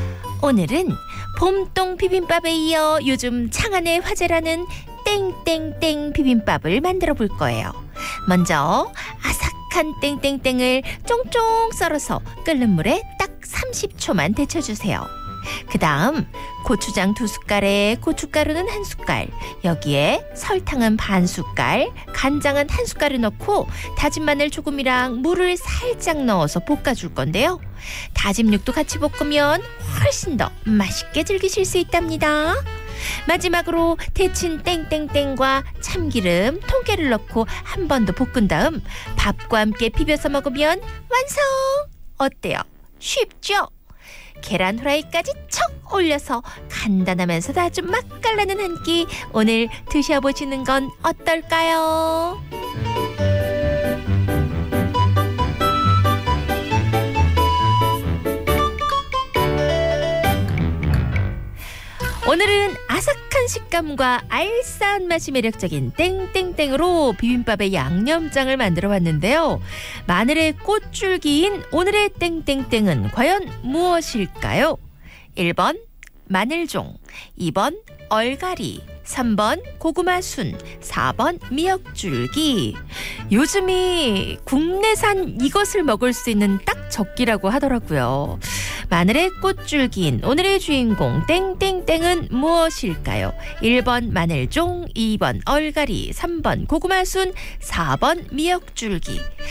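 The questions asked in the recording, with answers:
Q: 마늘의 꽃줄기인 오늘의 주인공 땡땡땡은 무엇일까요?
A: 1번: 마늘종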